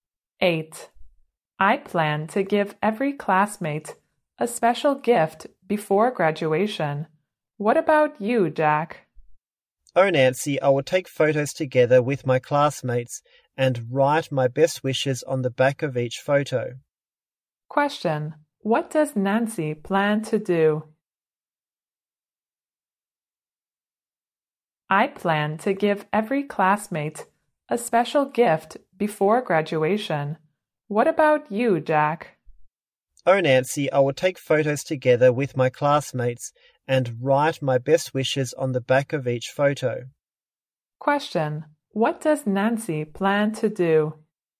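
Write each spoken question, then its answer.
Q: What does Nancy plan to do?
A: Give every classmate a special gift before graduation.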